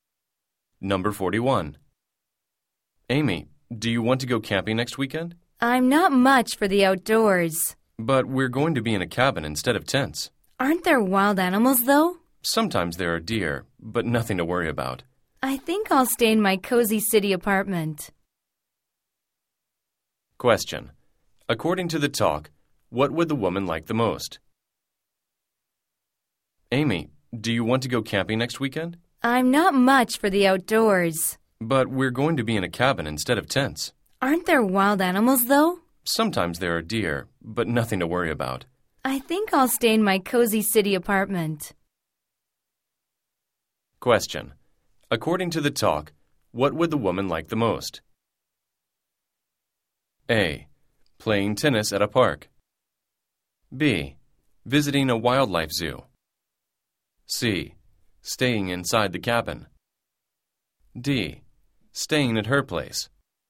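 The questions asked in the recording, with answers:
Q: According to the talk, what would the woman like the most?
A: D: Staying at her place.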